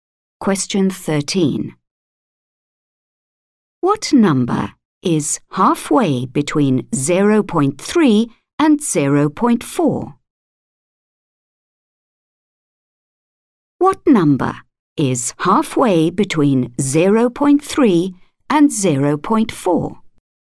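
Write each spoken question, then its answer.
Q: What number is halfway between 0.3 and 0.4?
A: 0.35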